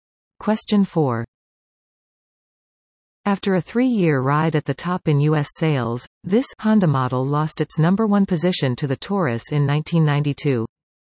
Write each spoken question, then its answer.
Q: After a three-year ride at the top in U.S. sales, this Honda model lost its number one position to the Taurus in 1992.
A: the Honda Accord.